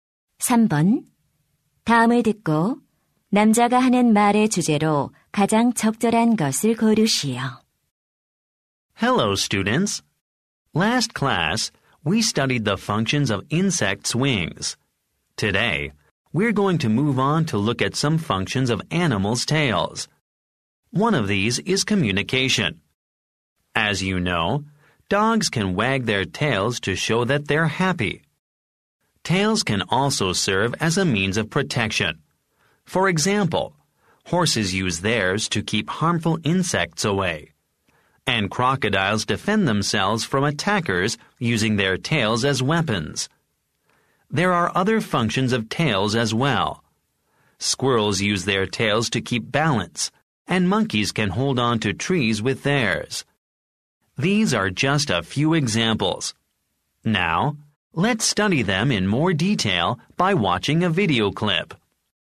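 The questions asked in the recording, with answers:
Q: 다음을 듣고 남자가 하는 말의 주제로 가장 적절한 것을 고르시오.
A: 동물 꼬리의 기능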